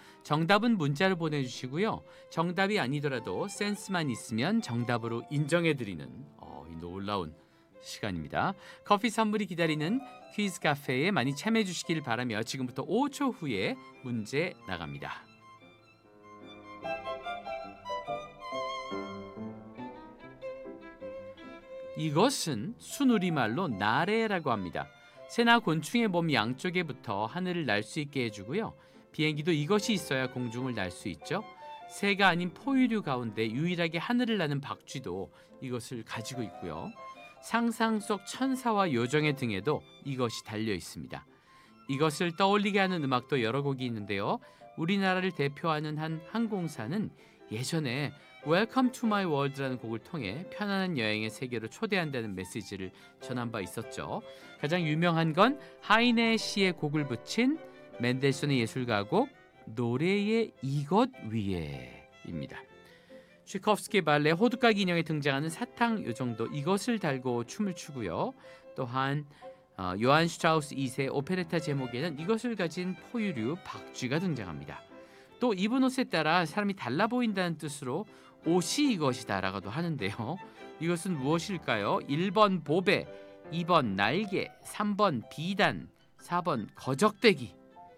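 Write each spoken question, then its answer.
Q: 이것은 무엇일까요? 1번 보배, 2번 날개, 3번 비단, 4번 거적대기.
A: 2: 날개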